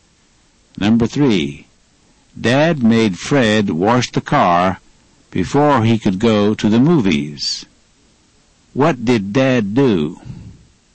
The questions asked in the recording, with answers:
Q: What did Dad do?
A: He made Fred wash the car before he could go to the movies.